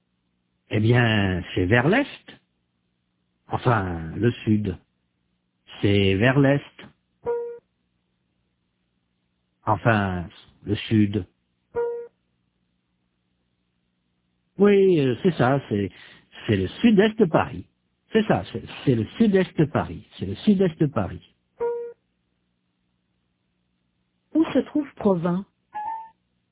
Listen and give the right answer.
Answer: Au sud-est de Paris.